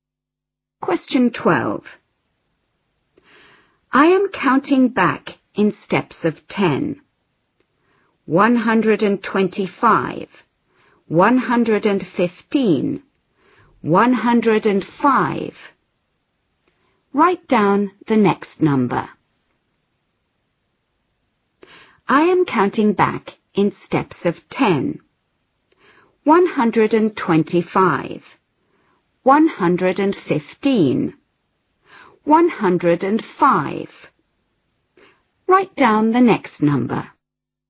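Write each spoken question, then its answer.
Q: Write down the next number.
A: 95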